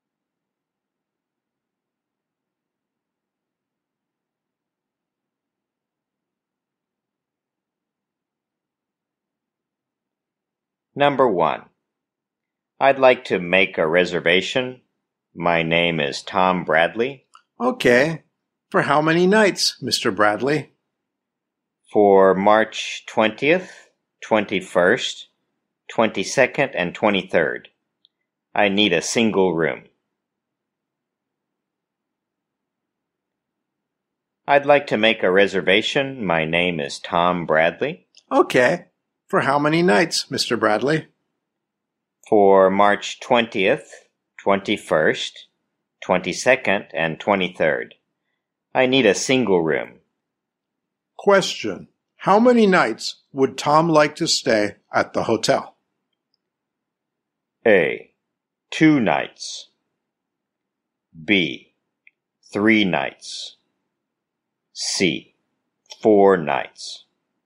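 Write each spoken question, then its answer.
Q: How many nights would Tom like to stay at the hotel?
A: C: 4 nights.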